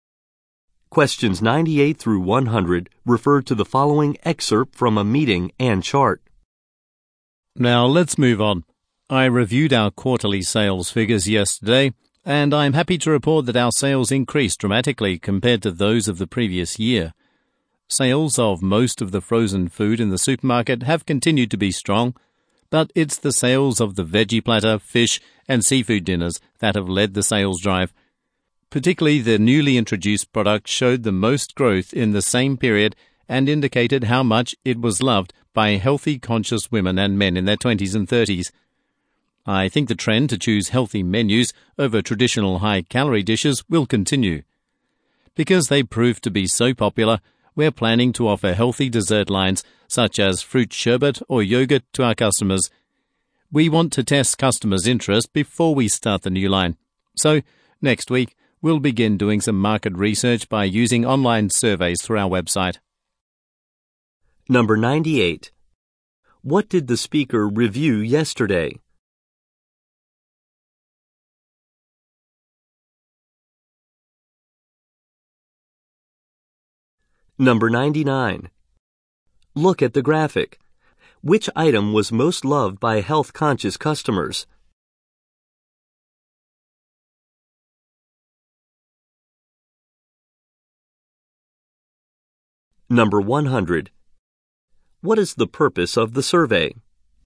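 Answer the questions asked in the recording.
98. Quarterly sales figures
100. To test customer interest in a new healthy dessert line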